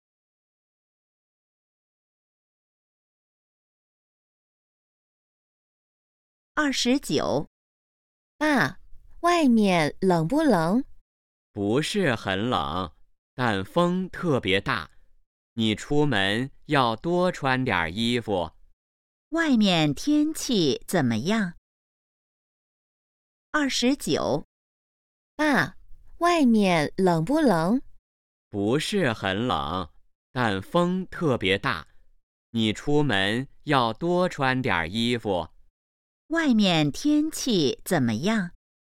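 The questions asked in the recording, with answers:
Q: 外面天气怎么样?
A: 不是很冷,但风特别大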